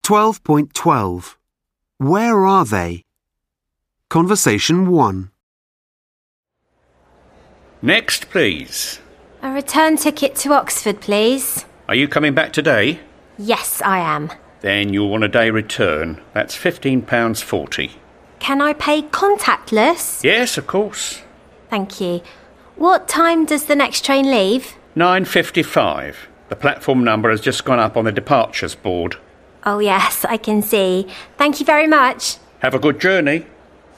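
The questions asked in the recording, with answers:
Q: Where are they?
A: At a train station ticket office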